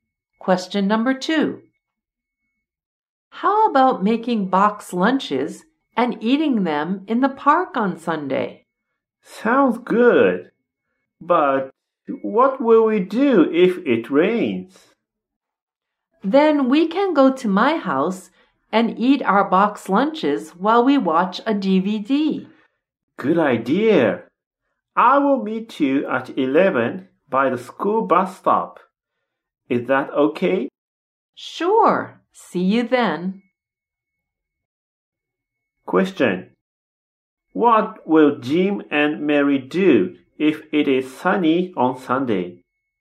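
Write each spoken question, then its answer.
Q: What will Jim and Mary do if it is sunny on Sunday?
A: Eat box lunches in the park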